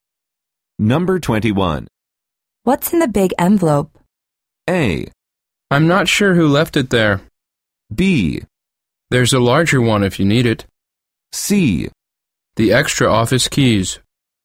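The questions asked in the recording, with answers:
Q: What's in the big envelope?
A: C: The extra office keys.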